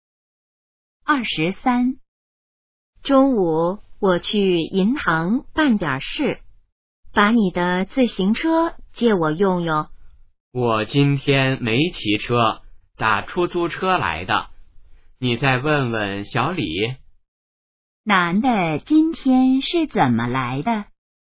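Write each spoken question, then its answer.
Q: 男的今天是怎么来的?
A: 打出租车来的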